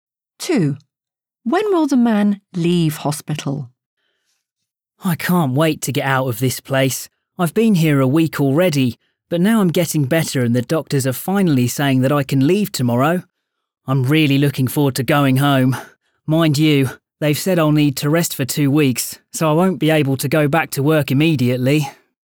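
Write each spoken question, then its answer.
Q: When will the man leave hospital?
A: tomorrow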